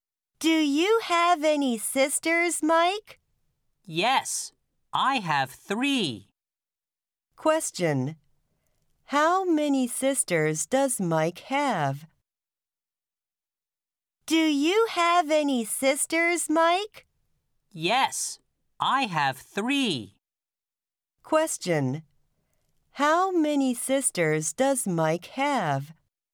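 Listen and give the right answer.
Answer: Three.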